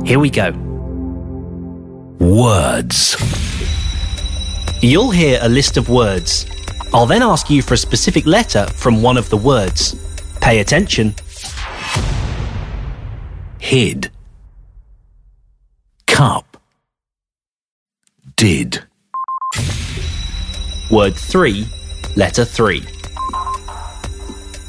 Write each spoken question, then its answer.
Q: Word 3, letter 3.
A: D is the answer.